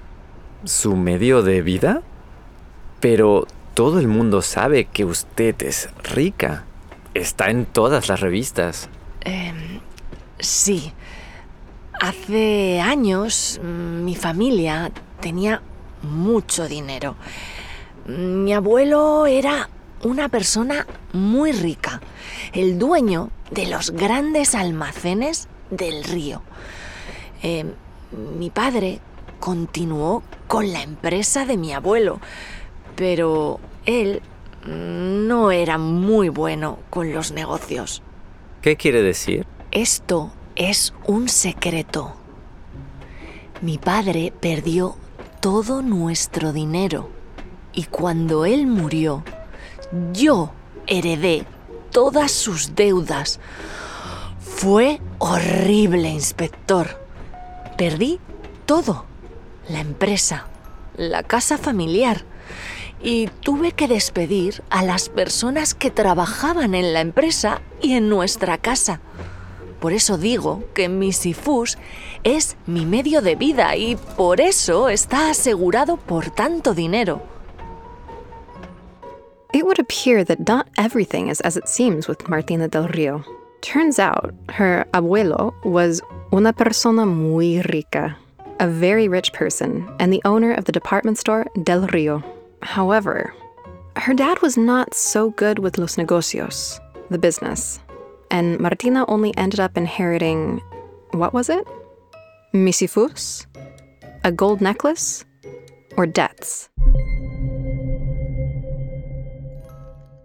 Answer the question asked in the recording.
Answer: Correcto. She only inherited deudas, debts.